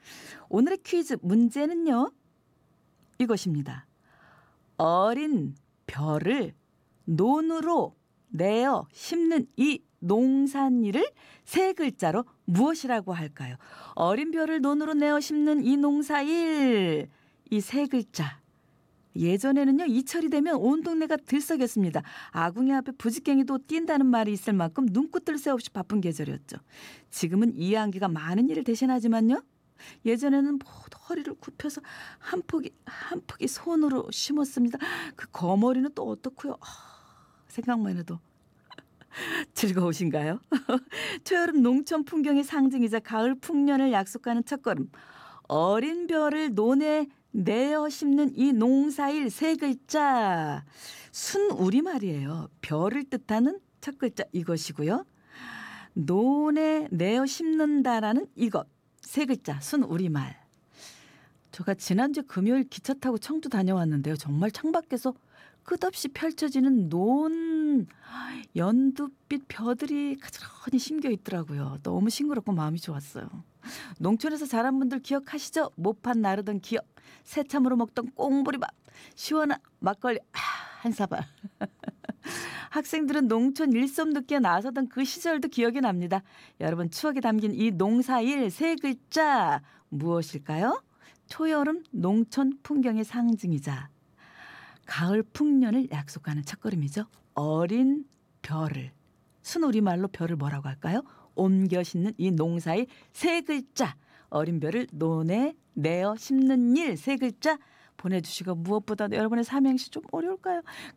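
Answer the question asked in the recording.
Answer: 모내기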